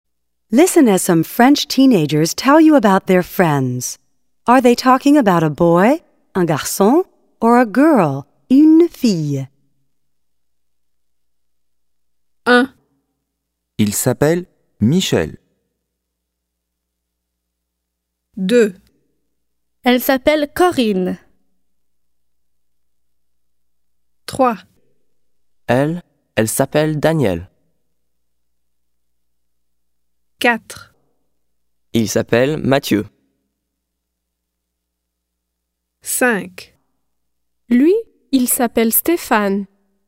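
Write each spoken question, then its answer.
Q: Are they talking about a boy, un garçon, or a girl, une fille?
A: a boy, un garçon

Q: Are they talking about a boy, un garçon, or a girl, une fille?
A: a girl, une fille

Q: Are they talking about a boy, un garçon, or a girl, une fille?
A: a girl, une fille

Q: Are they talking about a boy, un garçon, or a girl, une fille?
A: a boy, un garçon

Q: Are they talking about a boy, un garçon, or a girl, une fille?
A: a boy, un garçon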